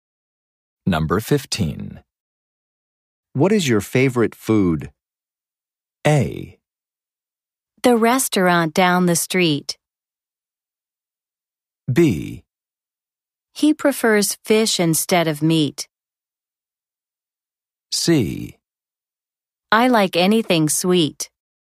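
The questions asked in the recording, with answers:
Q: What is your favorite food?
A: C: I like anything sweet.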